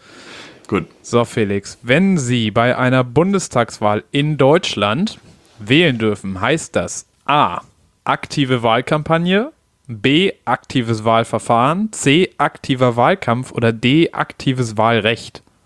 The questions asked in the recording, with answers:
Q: So, Felix, wenn Sie bei einer Bundestagswahl in Deutschland wählen dürfen, heißt das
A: Ja, auf jeden Fall D.